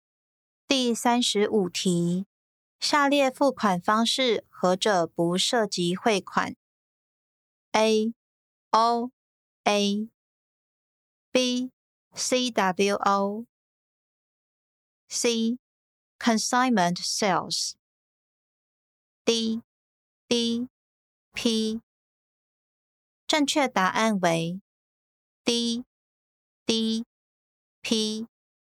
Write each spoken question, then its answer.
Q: 下列付款方式何者不涉及汇款?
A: 正确答案为 D D P。